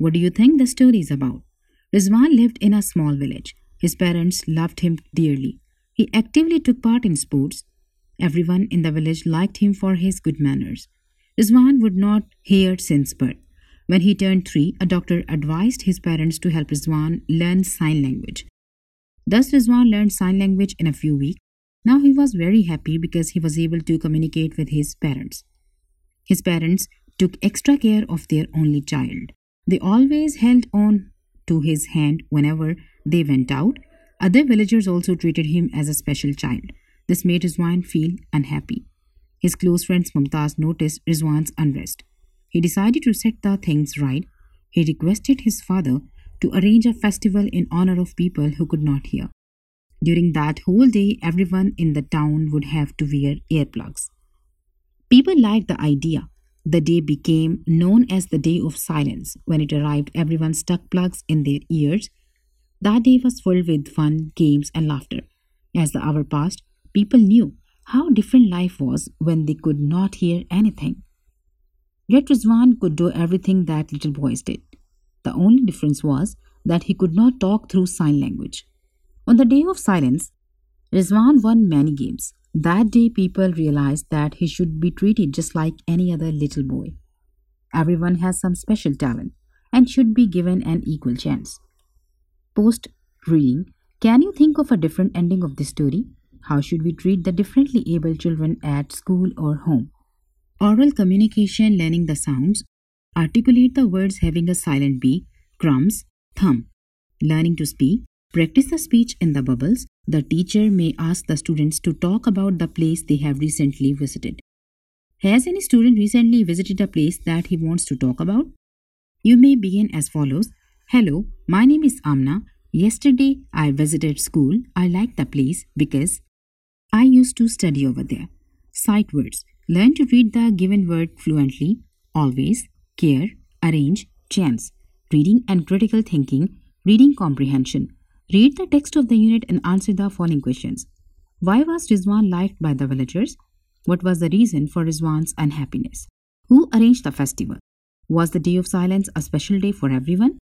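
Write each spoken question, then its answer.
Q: Why was Rizwan liked by the villagers?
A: Because of his good manners

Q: What was the reason for Rizwan's unhappiness?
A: He was treated as a special child

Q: Who arranged the festival?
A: Mumtaz's father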